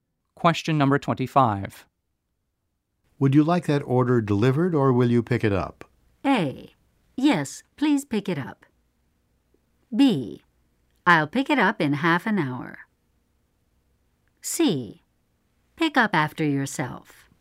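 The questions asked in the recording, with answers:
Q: Would you like that order delivered or will you pick it up?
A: B: I'll pick it up in half an hour.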